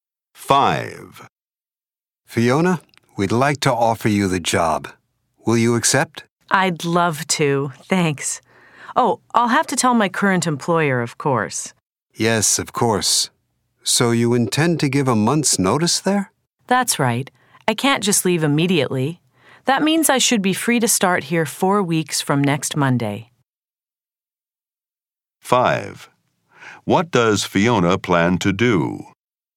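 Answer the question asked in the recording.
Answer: Give a month's notice and start the new job 4 weeks from next Monday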